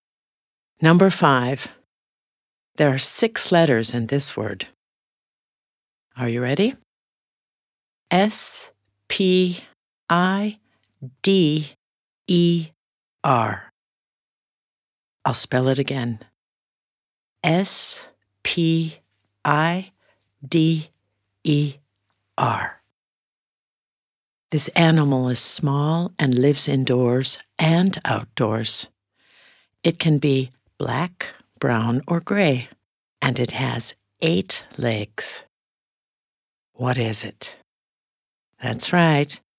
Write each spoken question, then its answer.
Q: What is it?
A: It's a spider.